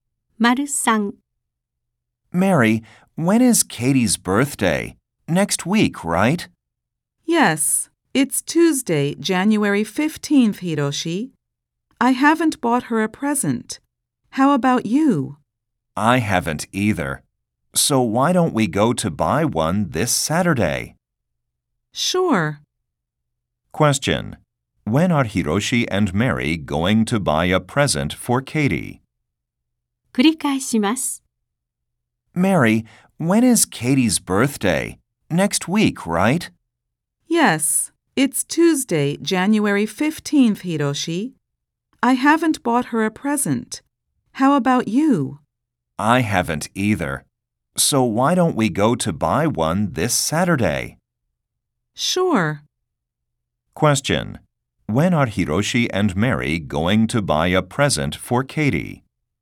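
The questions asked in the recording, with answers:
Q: When are Hiroshi and Mary going to buy a present for Katie?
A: This Saturday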